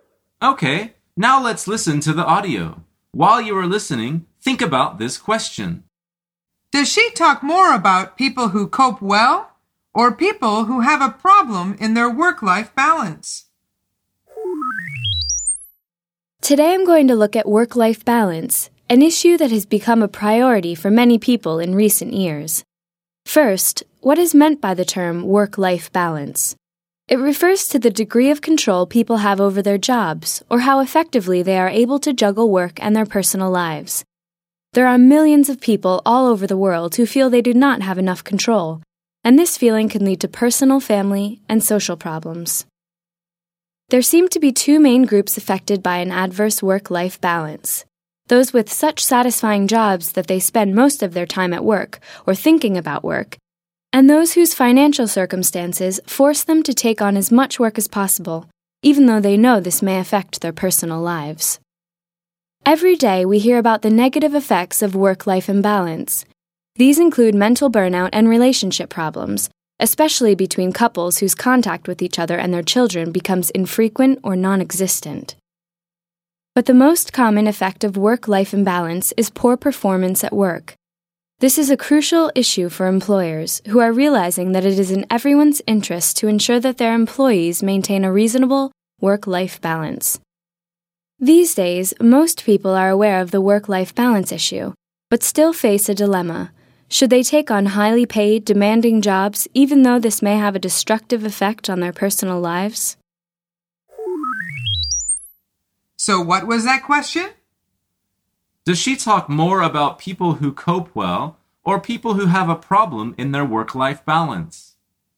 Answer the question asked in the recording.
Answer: The answer is people who have a problem in their work-life balance.